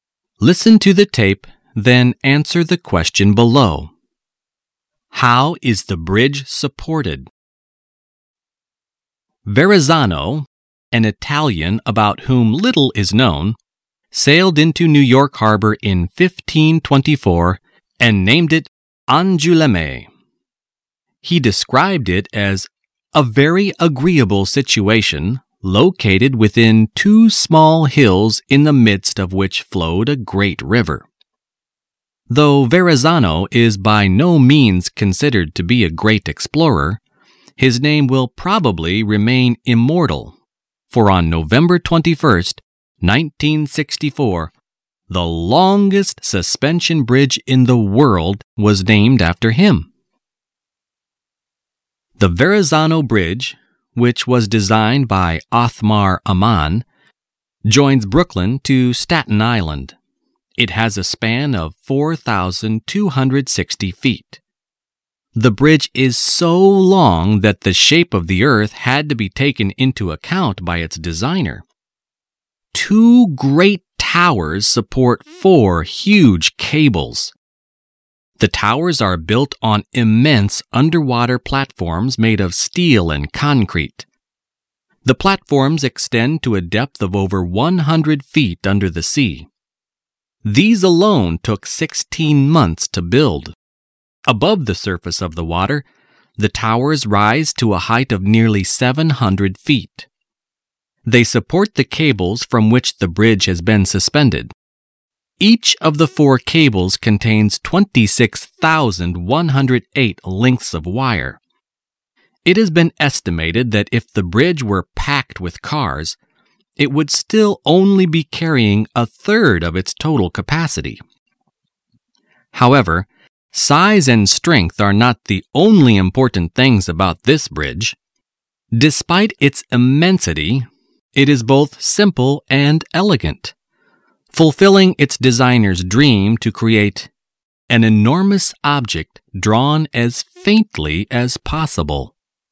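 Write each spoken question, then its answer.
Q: How is the bridge supported?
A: By two great towers that support four huge cables; the towers stand on huge steel and concrete platforms under the water.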